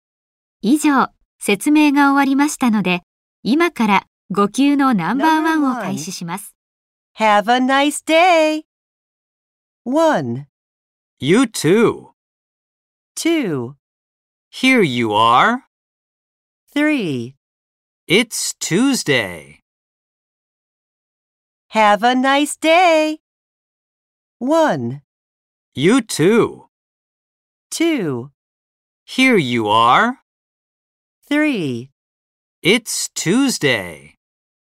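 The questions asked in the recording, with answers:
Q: Have a nice day!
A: 1: You too!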